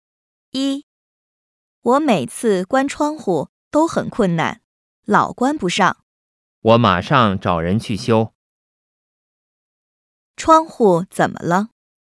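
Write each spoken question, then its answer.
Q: 窗户怎么了?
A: 关不上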